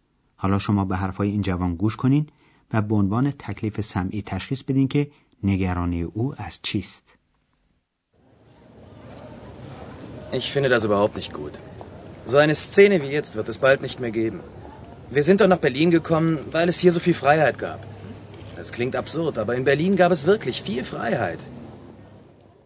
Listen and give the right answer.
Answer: پس ترس یا نگرانی جوان از اینه که چنین صحنه‌ای مثل حالا در آتی نزدیک دیگه وجود نخواهد داشت